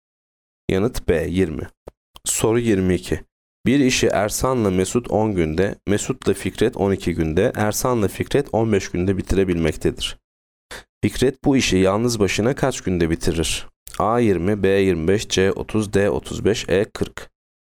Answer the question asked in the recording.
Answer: Yanıt E 40.